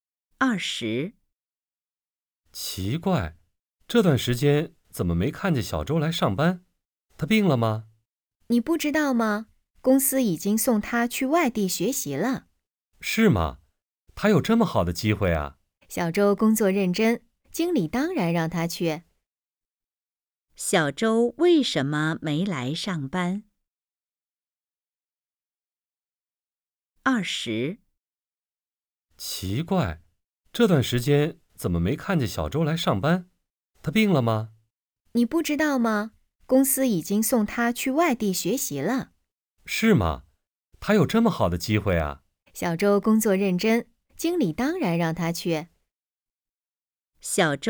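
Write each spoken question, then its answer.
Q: 小周为什么没来上班?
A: 公司送他去外地学习了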